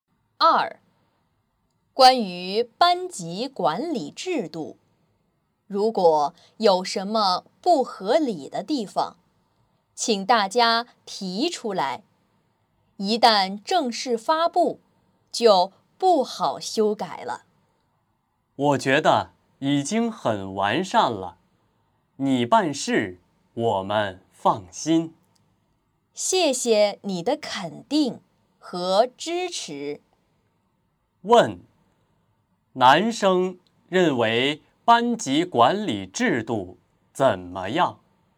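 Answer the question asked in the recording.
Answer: 已经很完善了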